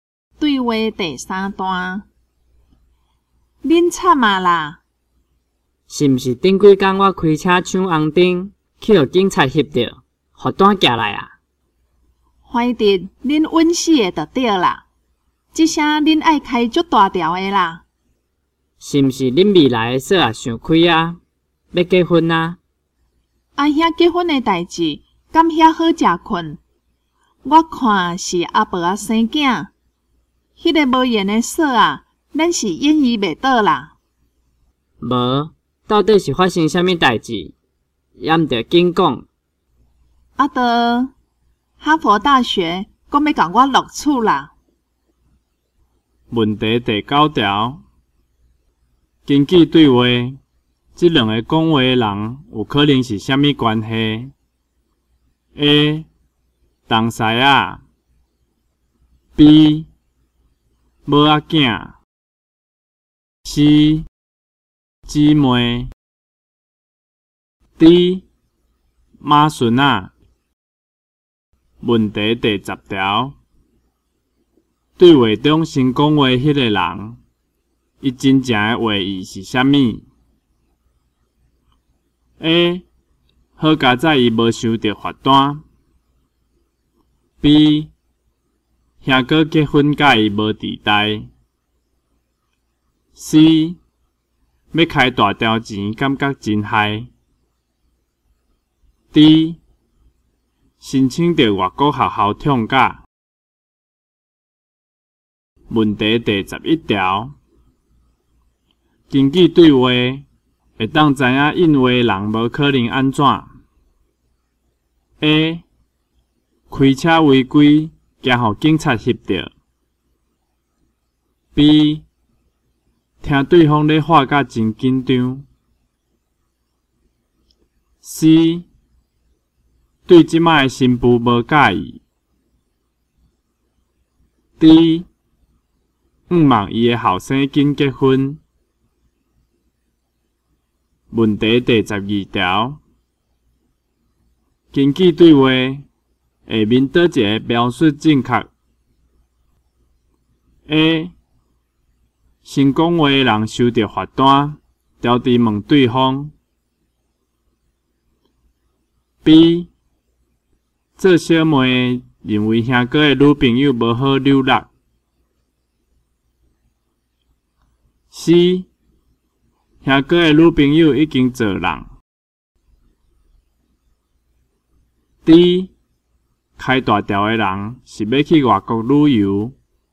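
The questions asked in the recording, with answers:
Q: 问题第十条,对话中先讲话迄个人,伊真正的话意是啥物?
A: D: 申请到外国学校畅假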